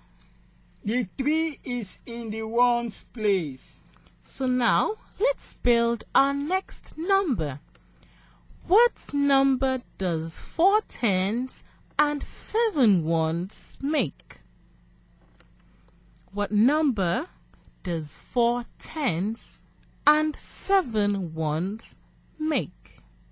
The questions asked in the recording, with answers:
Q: What number does 4 tens and 7 ones make?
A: 47.